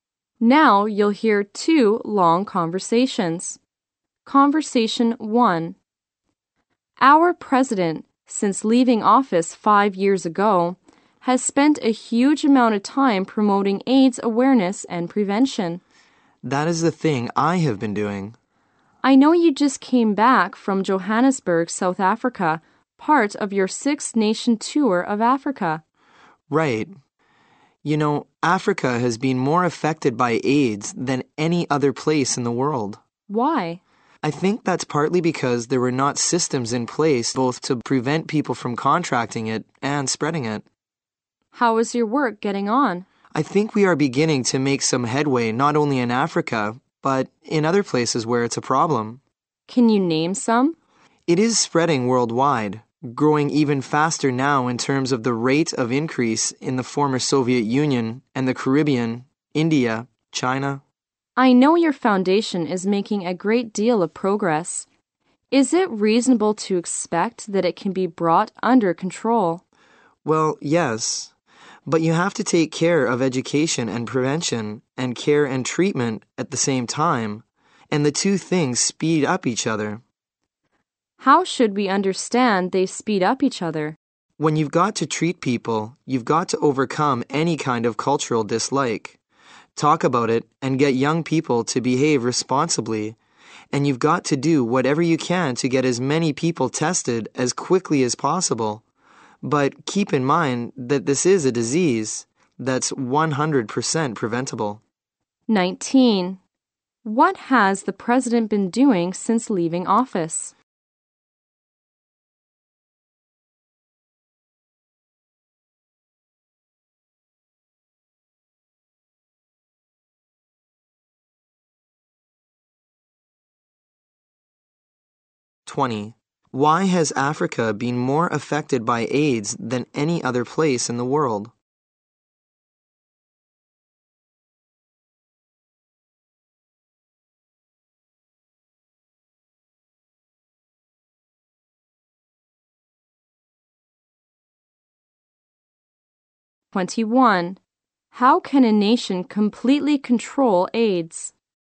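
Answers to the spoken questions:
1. Promoting AIDS awareness and prevention
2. It had no systems in place to stop people catching and spreading AIDS.
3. By working on education and prevention and on care and treatment at the same time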